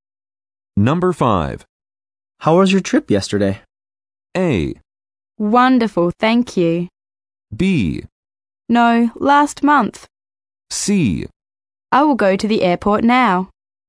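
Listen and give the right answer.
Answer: A: Wonderful, thank you.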